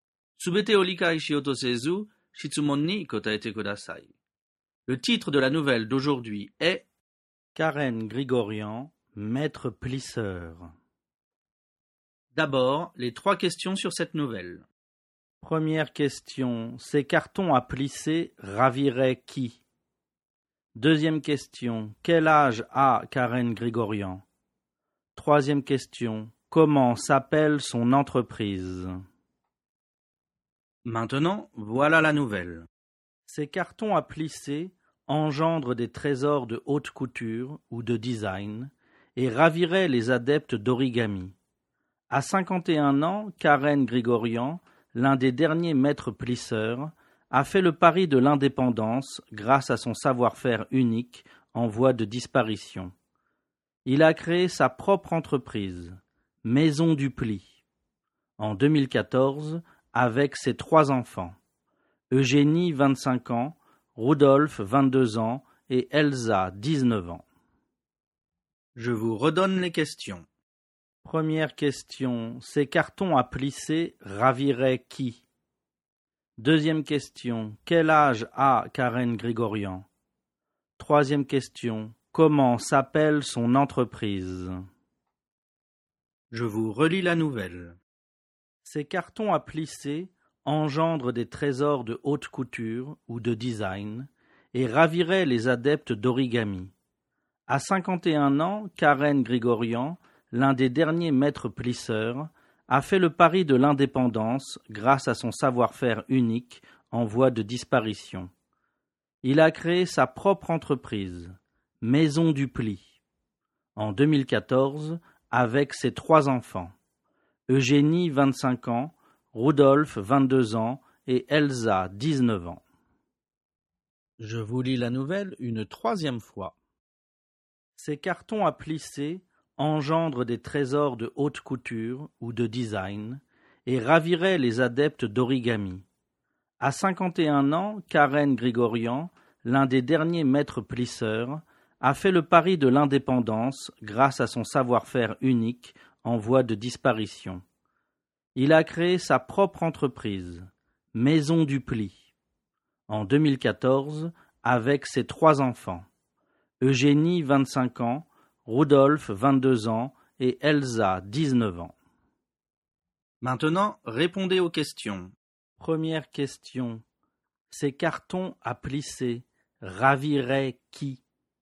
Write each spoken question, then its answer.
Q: Première question, ces cartons à plisser raviraient qui?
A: Ces cartons à plisser raviraient les adeptes d'origami.

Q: Deuxième question, quel âge a Karen Grigorian?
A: Réponse, Karen Grigorian a 51 ans.

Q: Troisième question, comment s'appelle son entreprise?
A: Son entreprise s'appelle Maison du Pli.